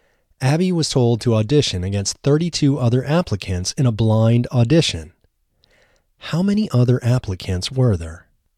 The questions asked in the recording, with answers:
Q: How many other applicants were there?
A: There were 32 other applicants.